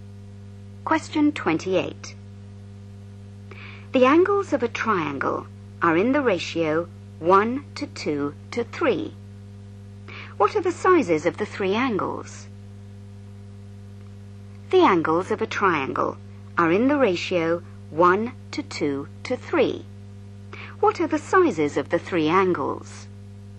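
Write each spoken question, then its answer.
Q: What are the sizes of the three angles?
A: 30, 60 and 90 degrees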